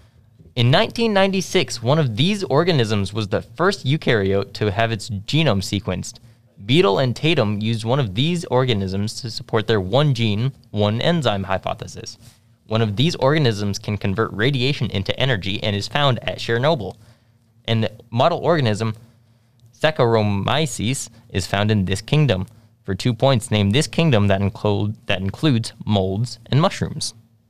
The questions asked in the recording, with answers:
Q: For 2 points, name this kingdom that includes molds and mushrooms.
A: Fungi. Yep.